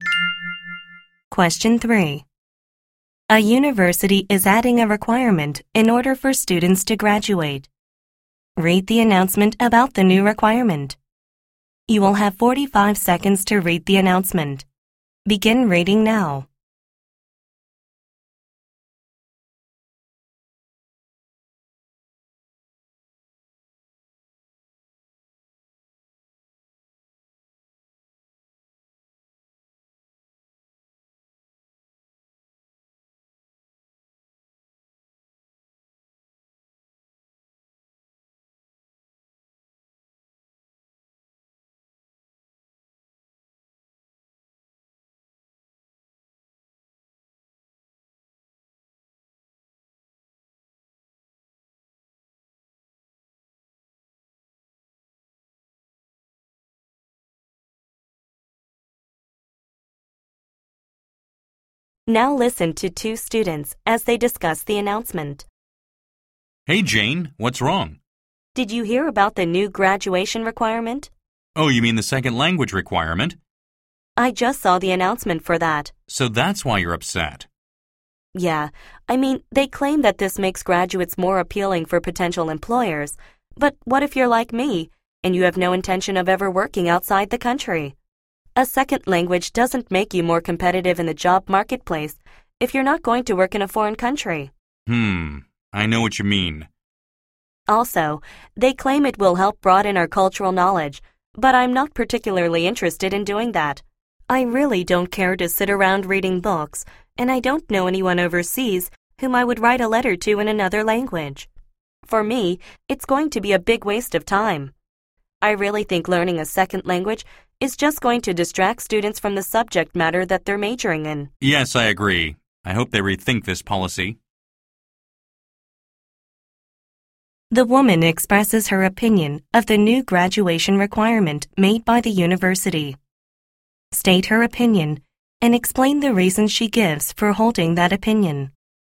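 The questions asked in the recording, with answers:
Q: State her opinion and explain the reasons she gives for holding that opinion.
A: She opposes the second-language requirement: she never plans to work abroad, so it won't make her more competitive, and she isn't interested in broadening her cultural knowledge, so it will be a waste of time.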